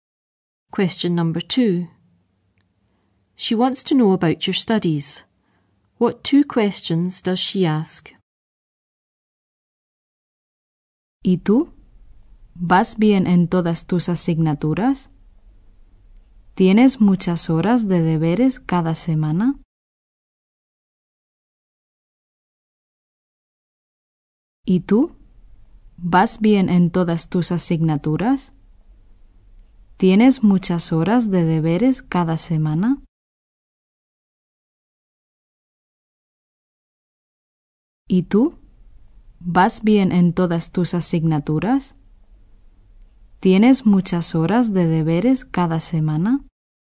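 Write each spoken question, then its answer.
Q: What two questions does she ask?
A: Are you doing well in all your subjects? Do you have many hours of homework each week?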